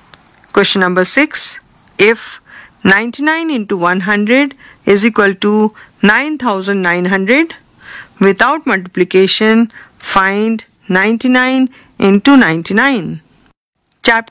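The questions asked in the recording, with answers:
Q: If 99 into 100 is equal to 9900, without multiplication, find 99 into 99.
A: 9801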